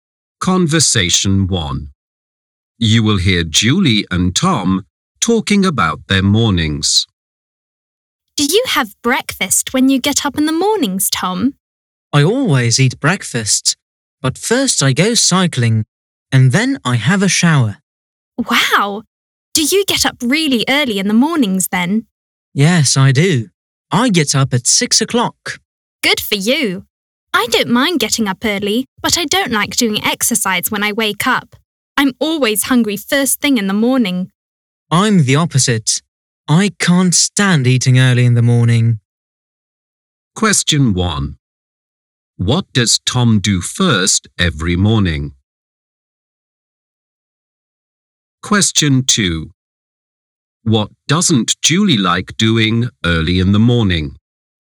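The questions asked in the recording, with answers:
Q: What does Tom do first every morning?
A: He goes cycling.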